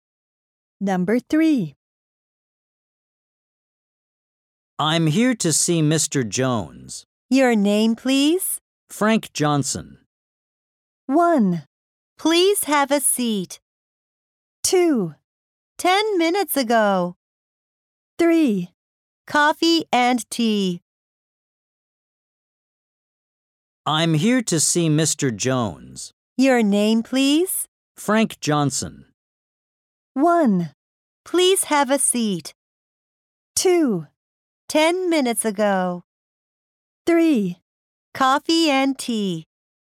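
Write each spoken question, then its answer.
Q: Your name, please?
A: 1: Please have a seat.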